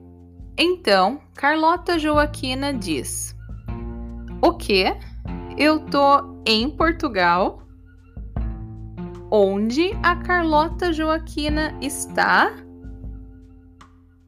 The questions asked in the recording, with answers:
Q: Onde a Carlota Joaquina está?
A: Portugal. Ela está em Portugal.